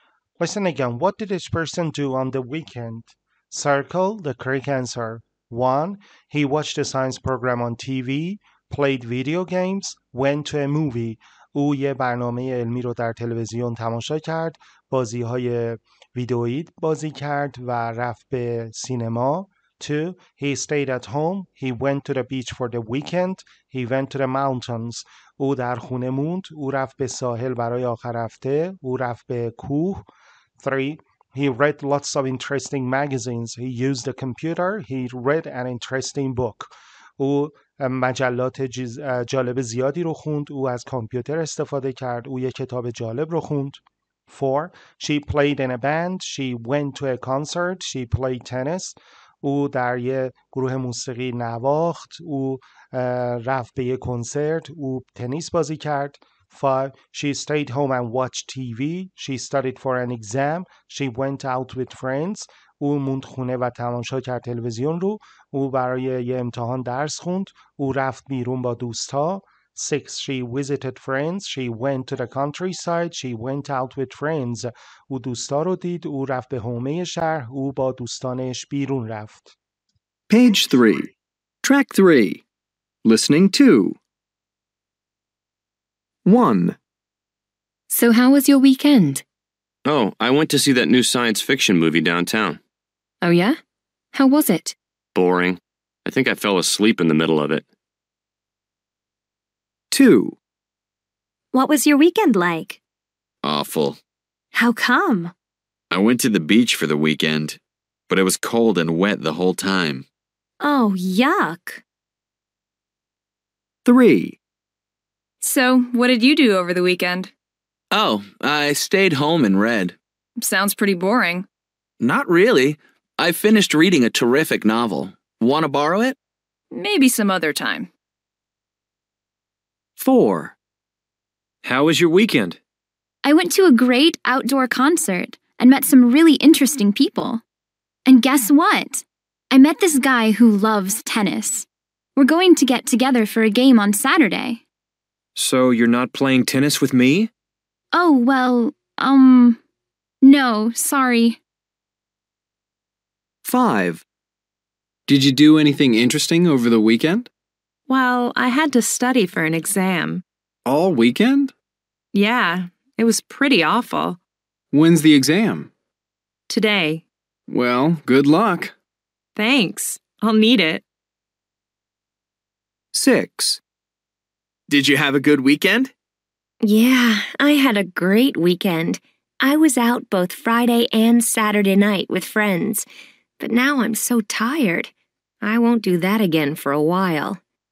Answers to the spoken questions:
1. 1C
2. 2B
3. 3C
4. 4B
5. 5B
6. 6C